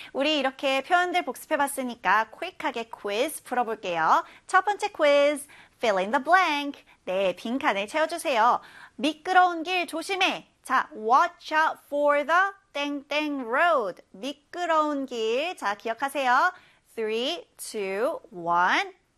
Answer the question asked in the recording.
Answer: 네, slippery road.